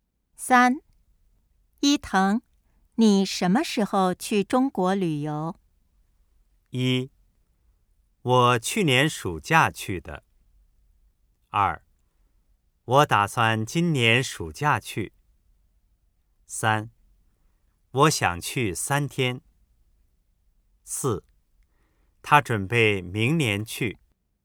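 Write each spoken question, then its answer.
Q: 伊藤,你什么时候去中国旅游?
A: 二: 我打算今年暑假去。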